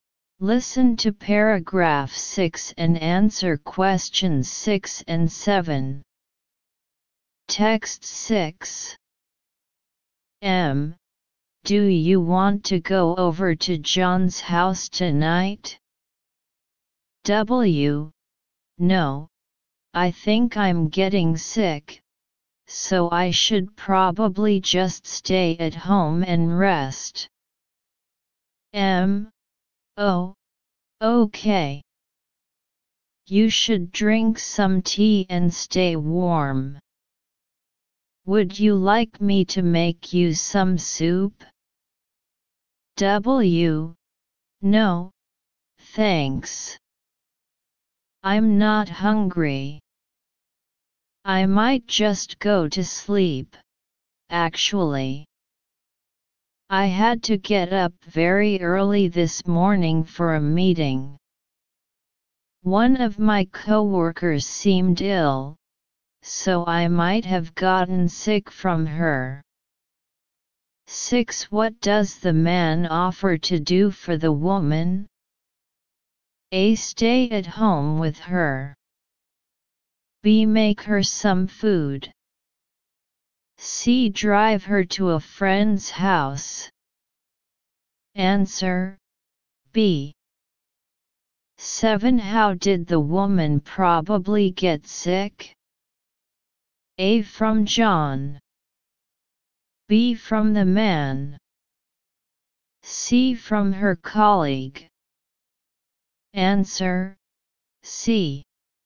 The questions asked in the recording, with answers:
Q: What does the man offer to do for the woman?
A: Answer, B.

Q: How did the woman probably get sick?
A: Answer, C.